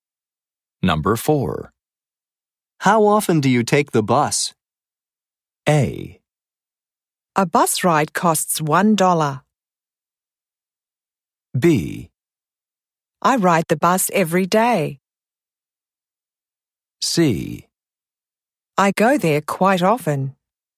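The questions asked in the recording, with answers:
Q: How often do you take the bus?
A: B: I ride the bus every day.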